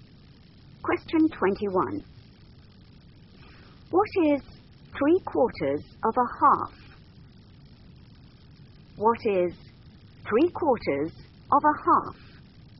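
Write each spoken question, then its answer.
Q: What is 3/4 of a half?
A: 3/8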